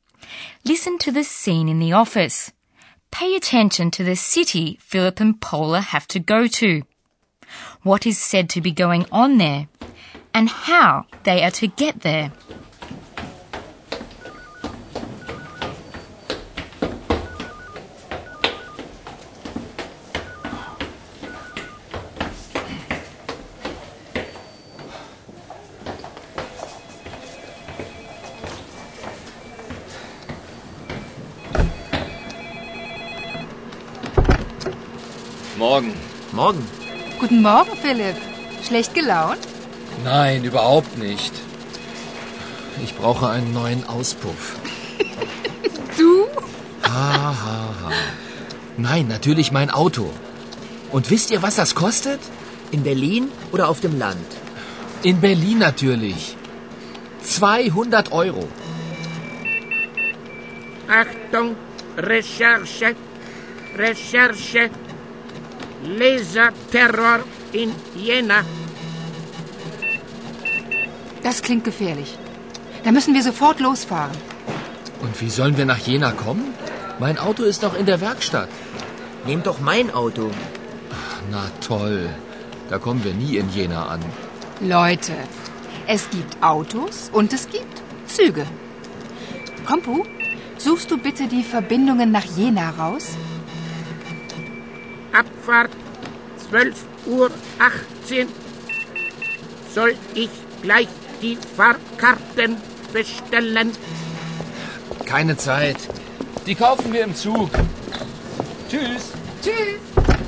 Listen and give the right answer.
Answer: Philip and Paula have to go to Jena.